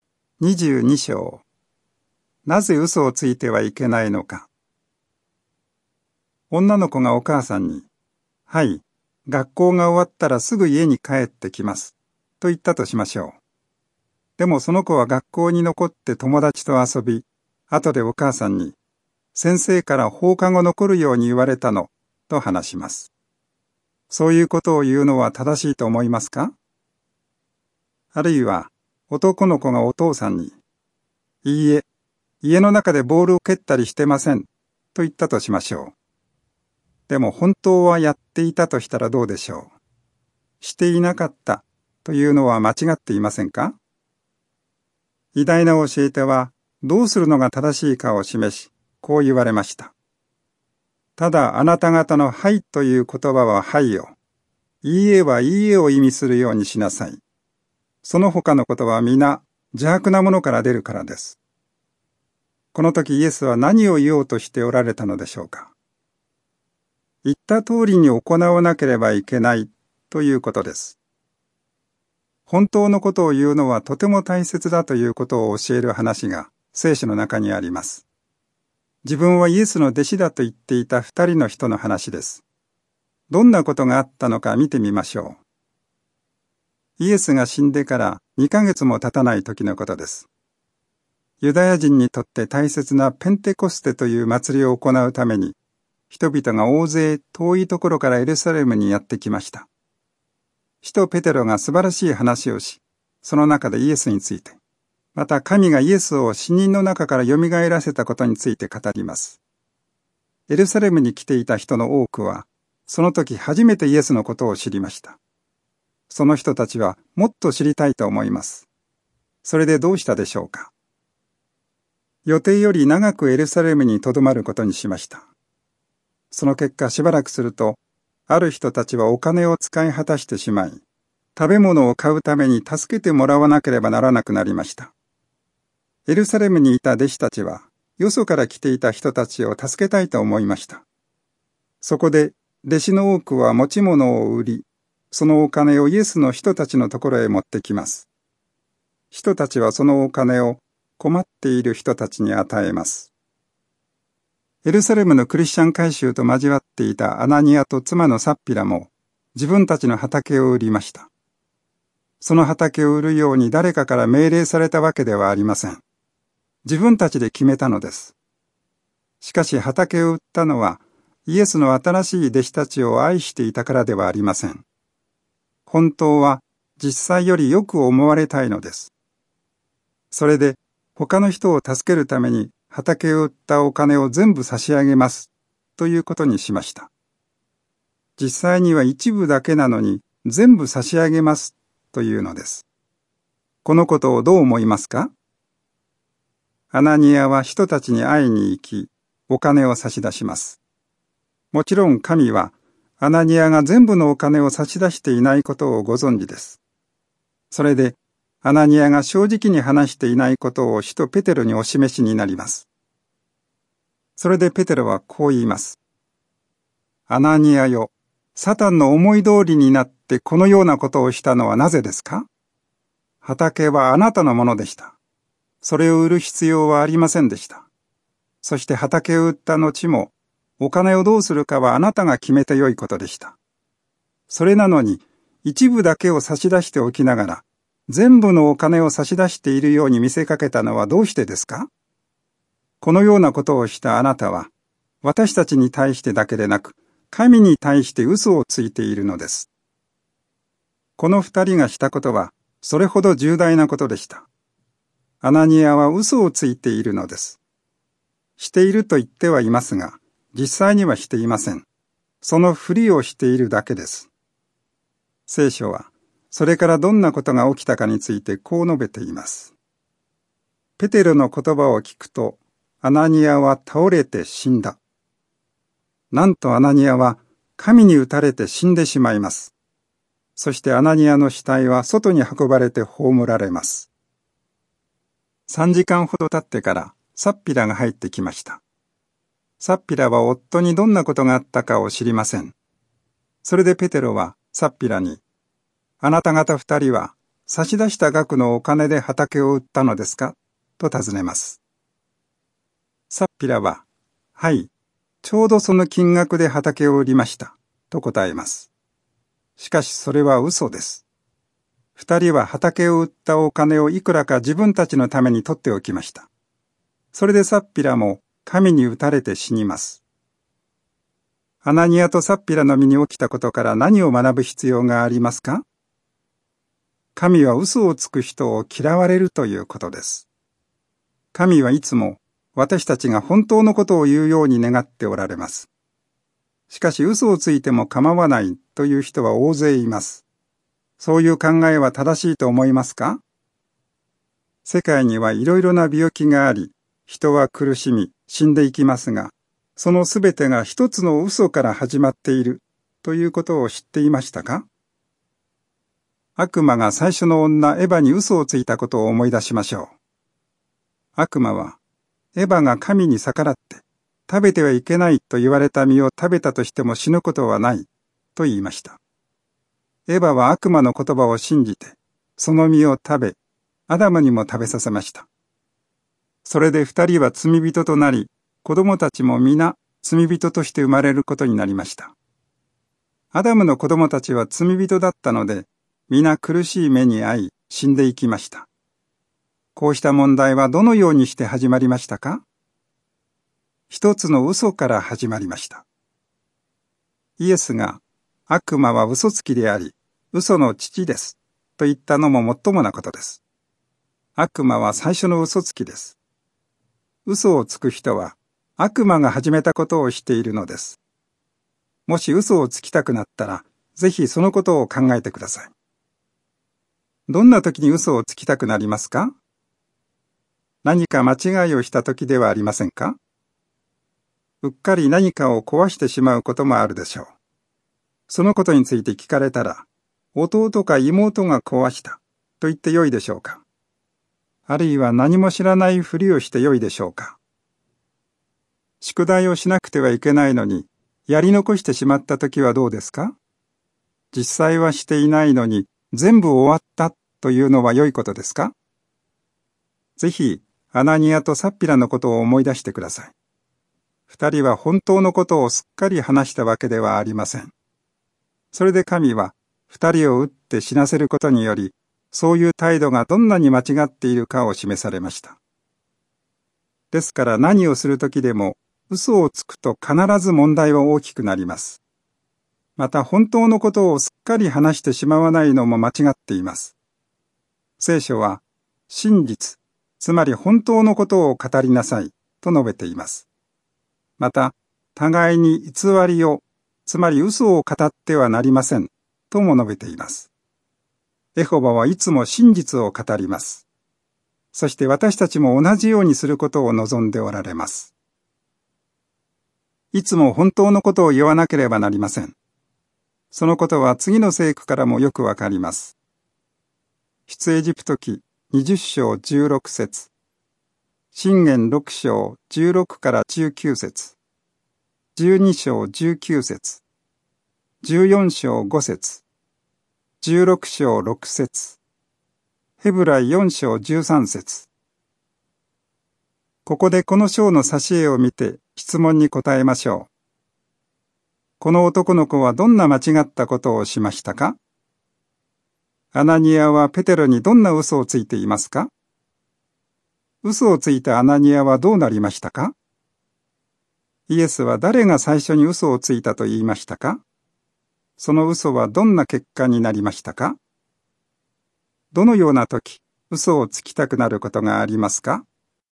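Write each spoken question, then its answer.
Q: アナニアはペテロにどんな嘘をついていますか?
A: 畑を売ったお金の一部だけなのに、全部差し出しているように見せかけた

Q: 嘘をついたアナニアはどうなりましたか?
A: 神に打たれて倒れて死んだ

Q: イエスは誰が最初に嘘をついたと言いましたか?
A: 悪魔

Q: その嘘はどんな結果になりましたか?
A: アダムとエヴァが罪人となり、その子供たちも皆罪人として生まれ、苦しんで死ぬようになった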